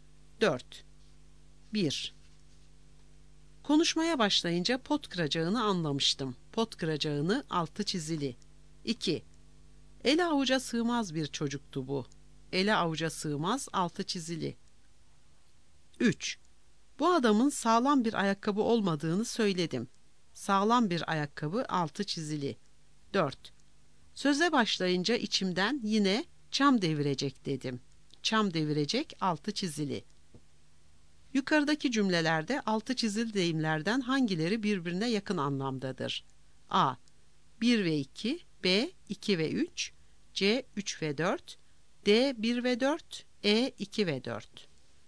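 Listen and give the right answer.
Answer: D: 1 ve 4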